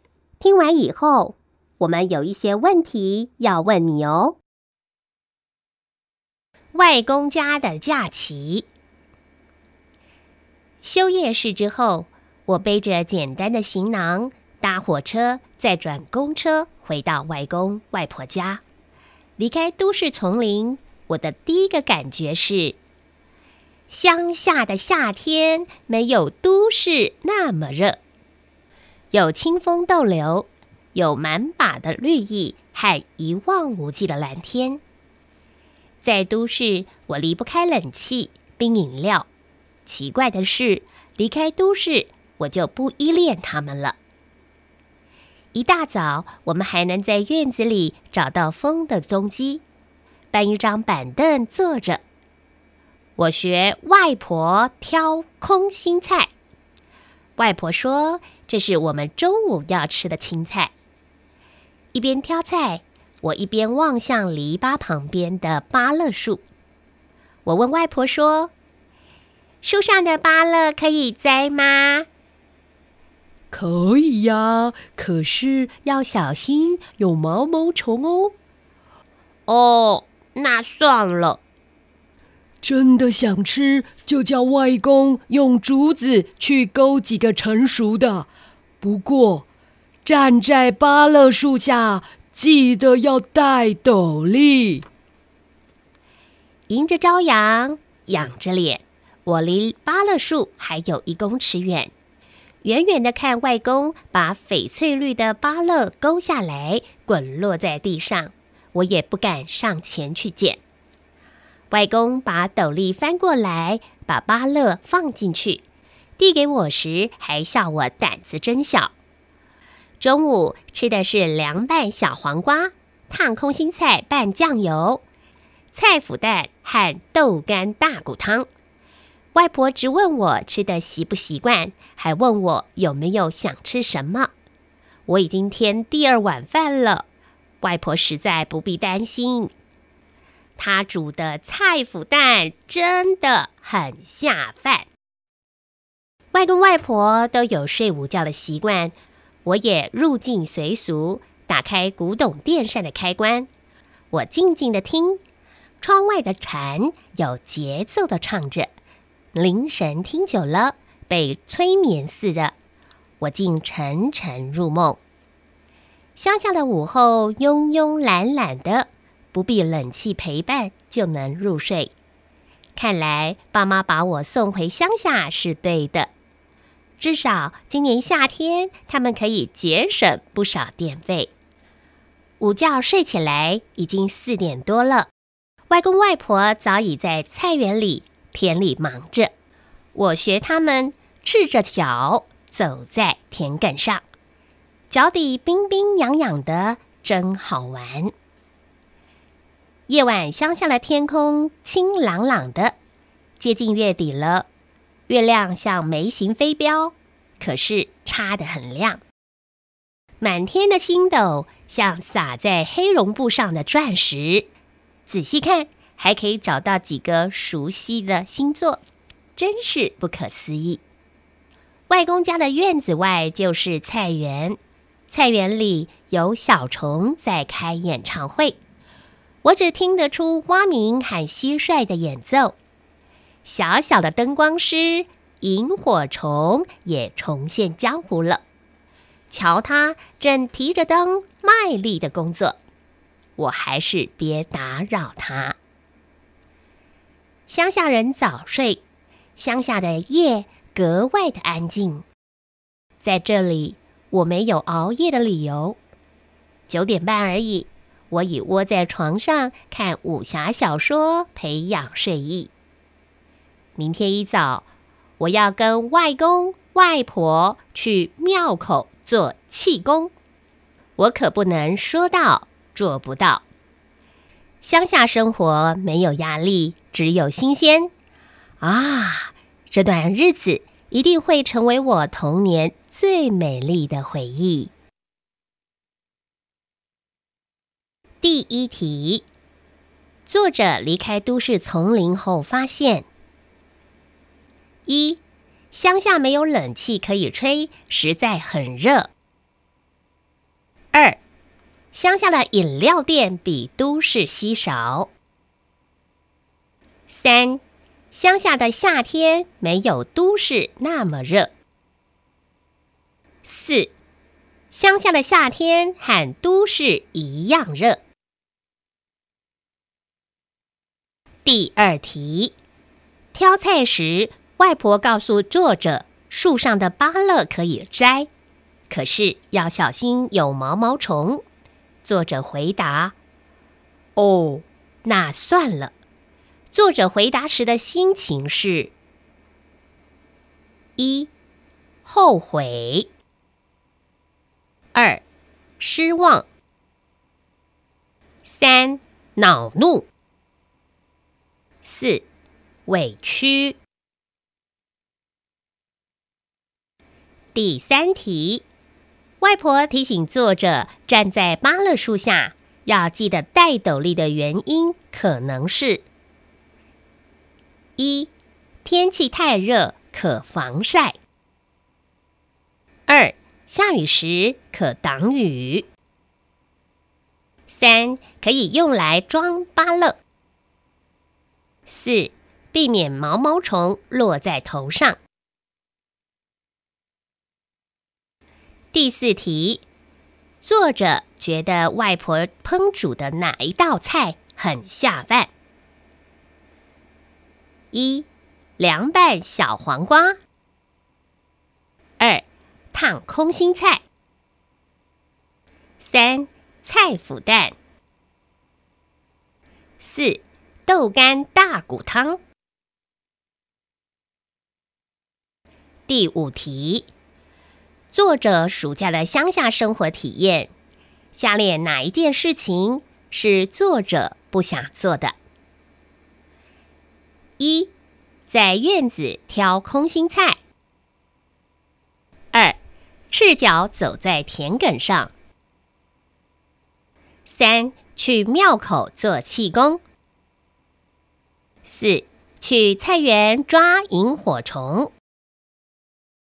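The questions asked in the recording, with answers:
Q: 作者离开都市丛林后发现:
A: 三:乡下的夏天没有都市那么热

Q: 作者回答时的心情是:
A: 二:失望

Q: 外婆提醒作者站在芭乐树下要记得戴斗笠的原因可能是:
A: 四:避免毛毛虫落在头上

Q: 作者觉得外婆烹煮的哪一道菜很下饭?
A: 三:菜脯蛋

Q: 作者暑假的乡下生活体验,下列哪一件事情是作者不想做的?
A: 四:去菜园抓萤火虫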